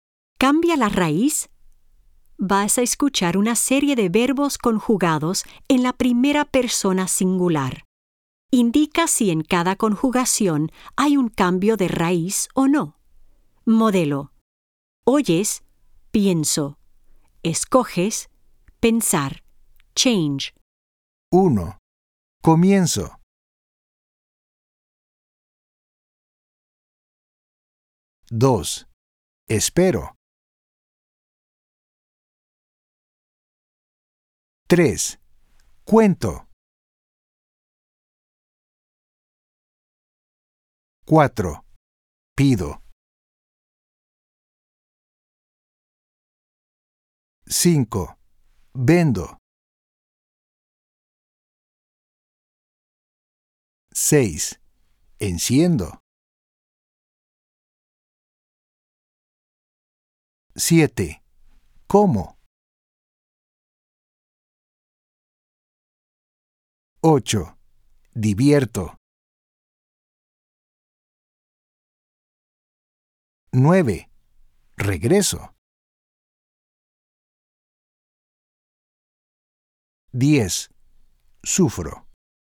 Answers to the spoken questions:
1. 1. Change from E to IE. Comenzar.
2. 2. No change. Esperar.
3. 3. Change from O to UE.
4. 4. Change from E to I.
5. 5. No change.
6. 6. Change from E to IE.
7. 7. No change.
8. 8. Change from E to IE.
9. 9. No change.
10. 10. No change.